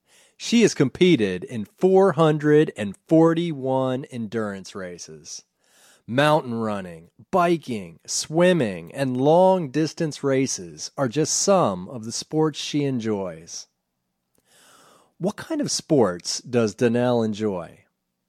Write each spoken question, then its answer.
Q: What kind of sports does Danielle enjoy?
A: She enjoys mountain running, biking, swimming, and long distance races.